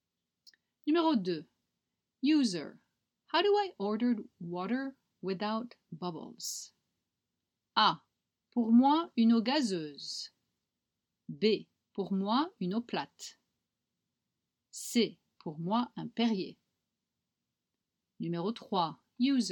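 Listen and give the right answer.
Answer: B: Pour moi, une eau plate.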